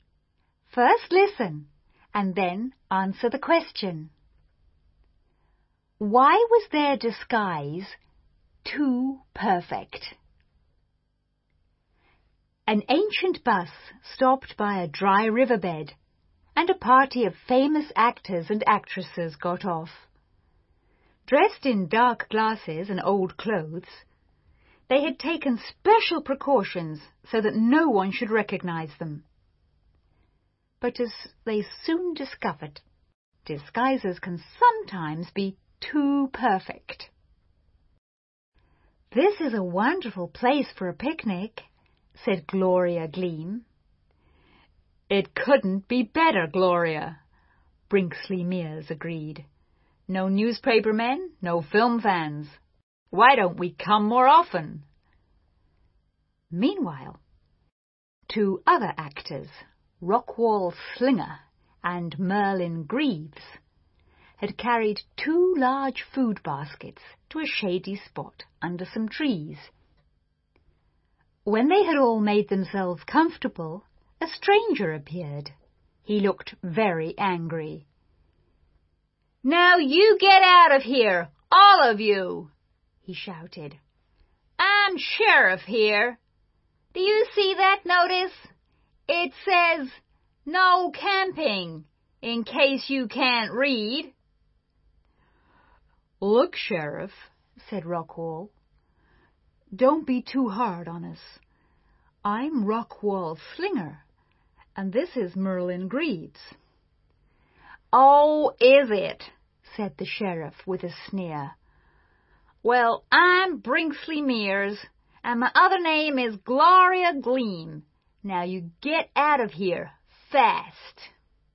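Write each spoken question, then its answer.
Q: Why was their disguise too perfect?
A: The sheriff did not recognize them and did not believe they were famous actors.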